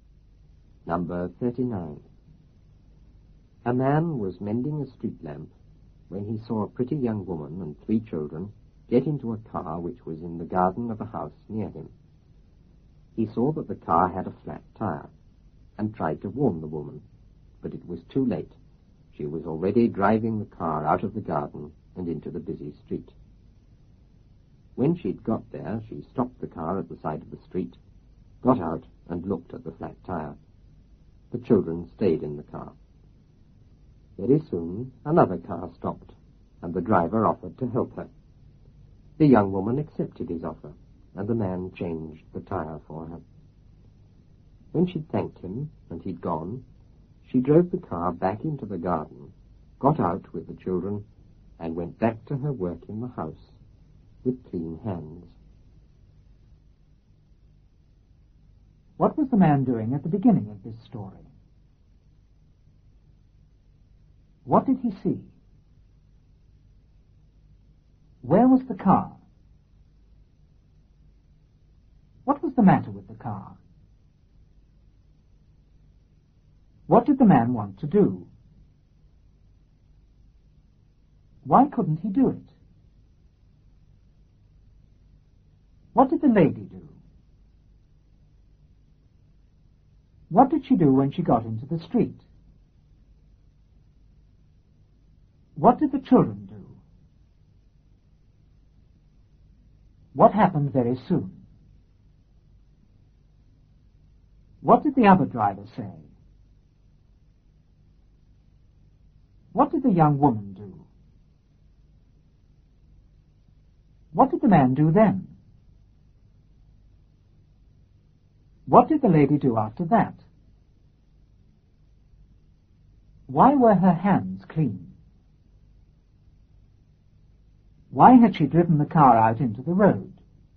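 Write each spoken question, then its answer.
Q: What was the man doing at the beginning of this story?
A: Mending a street lamp

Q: What did he see?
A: A pretty young woman and three children get into a car

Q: Where was the car?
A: In the garden of a house near him

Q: What was the matter with the car?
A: It had a flat tire

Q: What did the man want to do?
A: Warn the woman

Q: Why couldn't he do it?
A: It was too late; she was already driving out

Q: What did the lady do?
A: Drove the car out of the garden into the busy street

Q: What did she do when she got into the street?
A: Stopped at the side, got out and looked at the flat tire

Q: What did the children do?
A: Stayed in the car

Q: What happened very soon?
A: Another car stopped

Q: What did the other driver say?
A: He offered to help her

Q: What did the young woman do?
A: Accepted his offer

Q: What did the man do then?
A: Changed the tire for her

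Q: What did the lady do after that?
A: Thanked him, drove back into the garden and went back to work in the house

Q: Why were her hands clean?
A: Because the other driver changed the tire

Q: Why had she driven the car out into the road?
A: To get someone to change the tire for her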